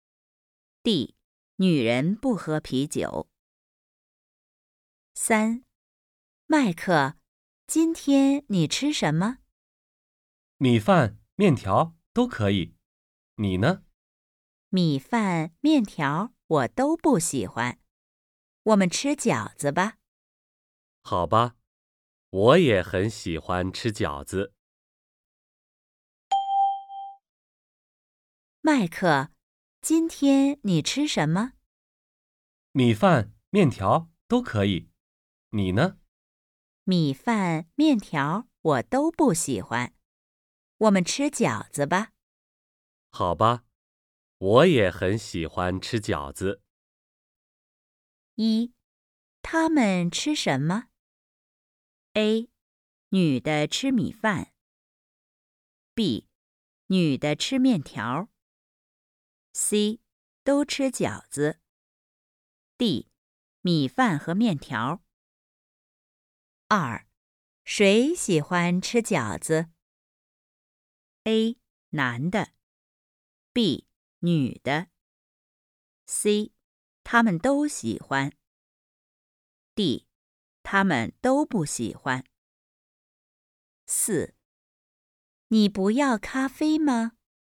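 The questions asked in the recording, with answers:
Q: 他们吃什么?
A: C: 都吃饺子。

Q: 谁喜欢吃饺子?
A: C: 他们都喜欢。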